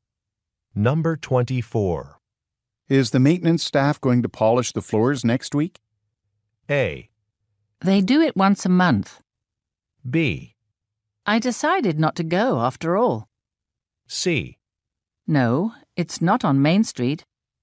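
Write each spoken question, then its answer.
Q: Is the maintenance staff going to polish the floors next week?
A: A: They do it once a month.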